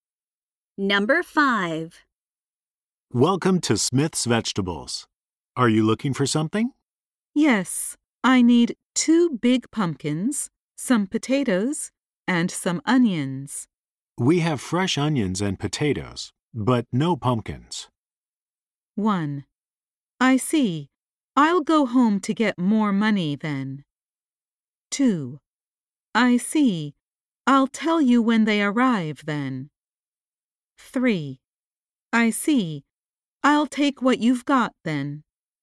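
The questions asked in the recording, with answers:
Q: We have fresh onions and potatoes, but no pumpkins.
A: 3: I see. I'll take what you've got then.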